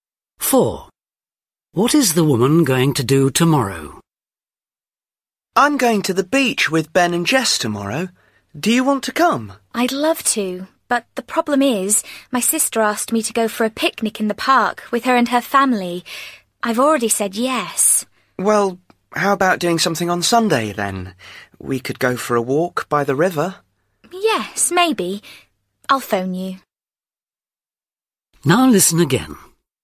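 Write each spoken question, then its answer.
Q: What is the woman going to do tomorrow?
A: have a picnic in the park with her sister's family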